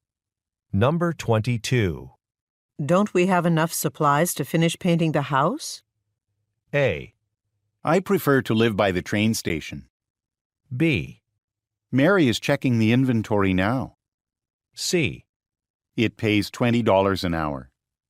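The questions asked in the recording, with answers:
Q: Don't we have enough supplies to finish painting the house?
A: B: Mary is checking the inventory now.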